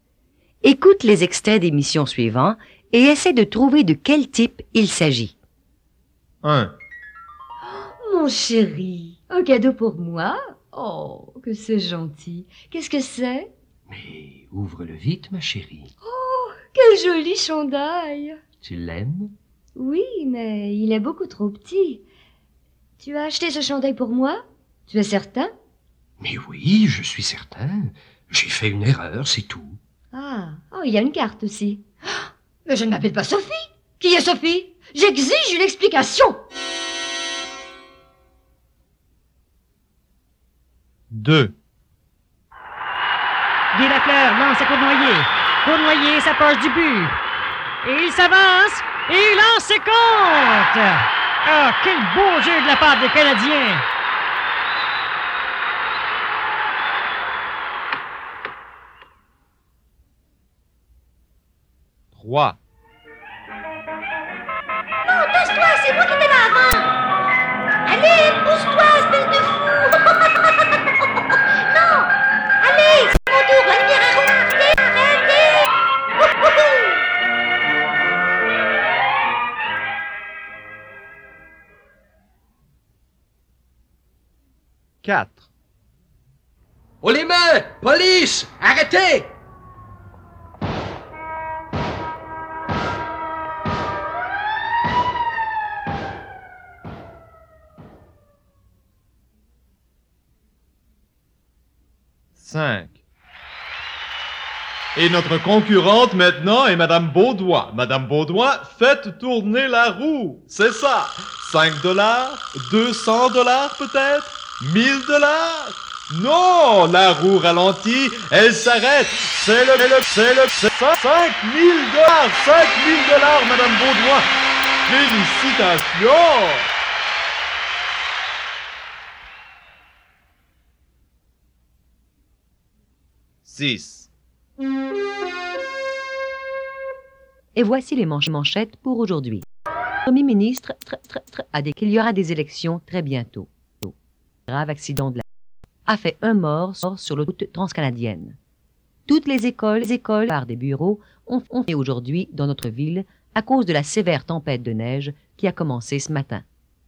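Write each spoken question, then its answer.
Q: Écoute les extraits d'émissions suivants et essaie de trouver de quel type il s'agit.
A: une émission de sport (hockey)

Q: Écoute les extraits d'émissions suivants et essaie de trouver de quel type il s'agit.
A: une émission policière

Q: Écoute les extraits d'émissions suivants et essaie de trouver de quel type il s'agit.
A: un jeu télévisé

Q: Écoute les extraits d'émissions suivants et essaie de trouver de quel type il s'agit.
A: les nouvelles (informations)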